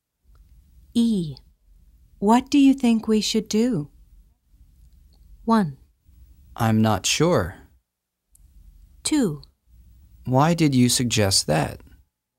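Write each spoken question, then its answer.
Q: What do you think we should do?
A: 1: I'm not sure.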